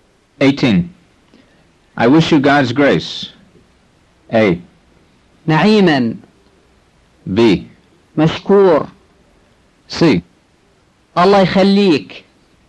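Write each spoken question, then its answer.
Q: I wish you God's grace.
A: A: نعيما.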